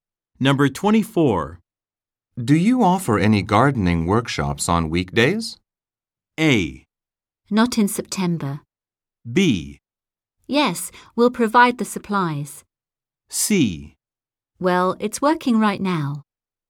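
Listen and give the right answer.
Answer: A: Not in September.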